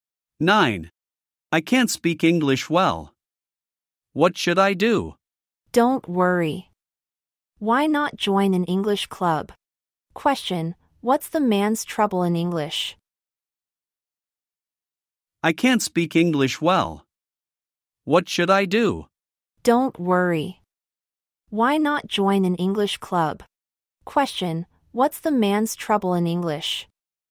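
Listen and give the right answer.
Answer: He can't speak English well.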